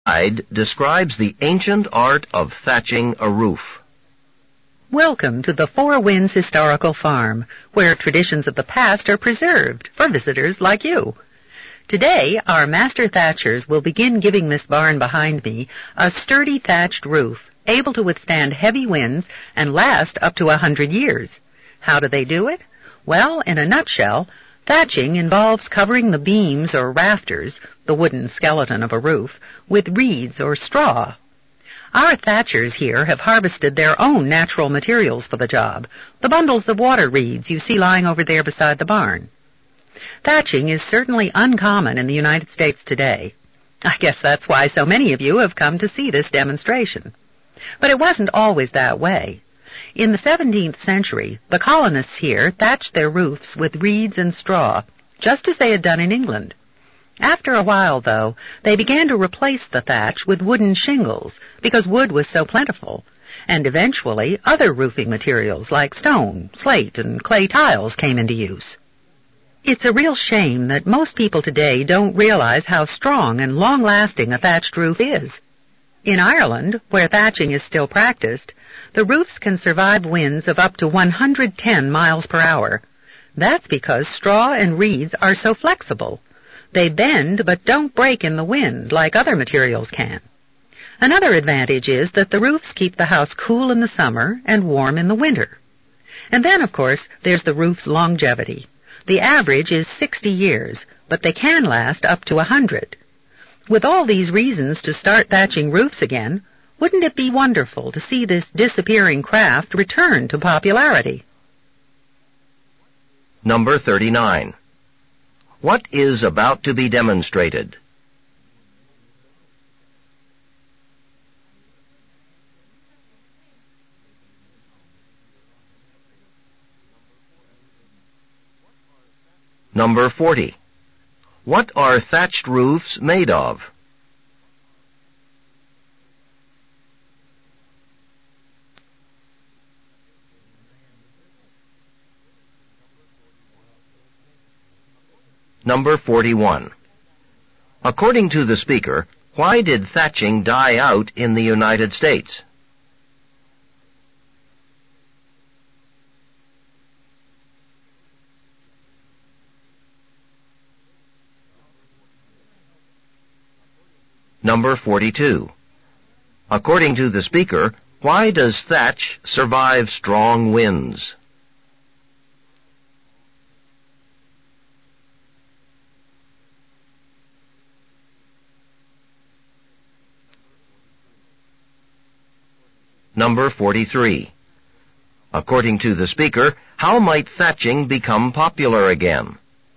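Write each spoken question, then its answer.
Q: What is about to be demonstrated?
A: Thatching a roof (on a barn)

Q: What are thatched roofs made of?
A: Reeds or straw

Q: According to the speaker, why did thatching die out in the United States?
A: Wood was plentiful, so wooden shingles replaced it

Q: According to the speaker, why does thatch survive strong winds?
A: Straw and reeds are flexible and bend without breaking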